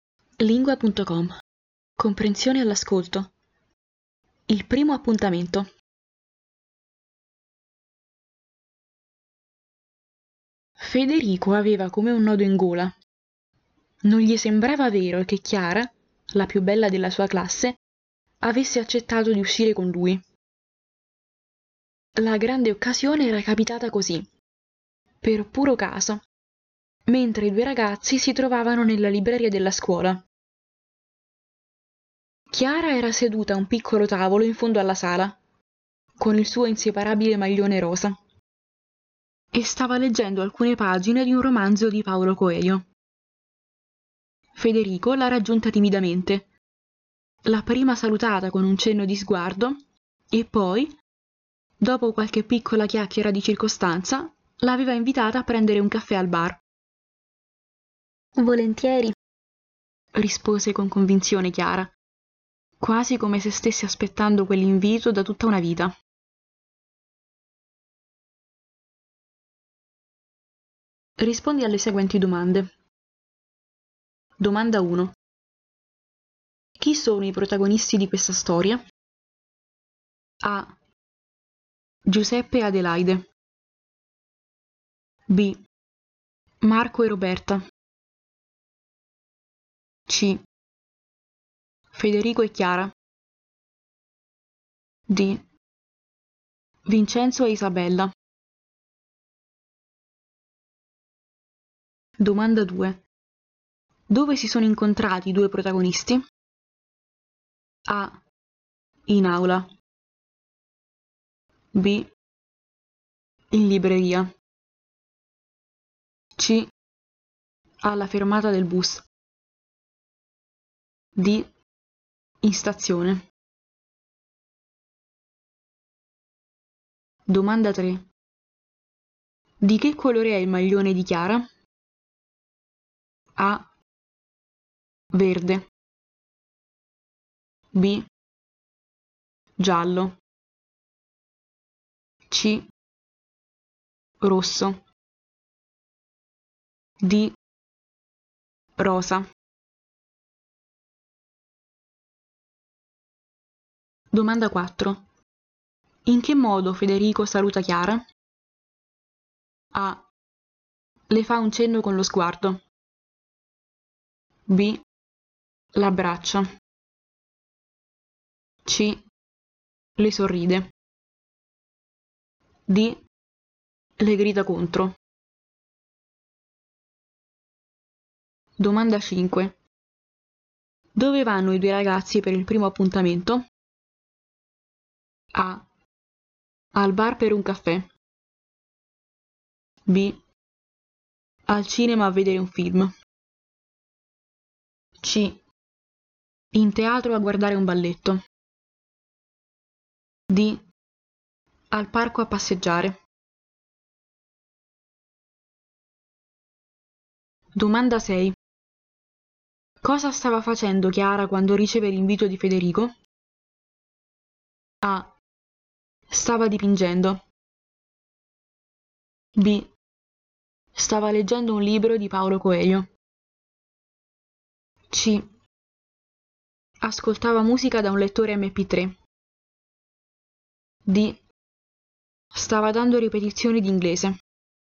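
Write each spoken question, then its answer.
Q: Chi sono i protagonisti di questa storia?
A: C: Federico e Chiara.

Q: Dove si sono incontrati i due protagonisti?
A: B: In libreria.

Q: Di che colore è il maglione di Chiara?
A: D: Rosa.

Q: In che modo Federico saluta Chiara?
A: A: Le fa un cenno con lo sguardo.

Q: Dove vanno i due ragazzi per il primo appuntamento?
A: A: Al bar per un caffè.

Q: Cosa stava facendo Chiara quando riceve l'invito di Federico?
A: B: Stava leggendo un libro di Paolo Coelho.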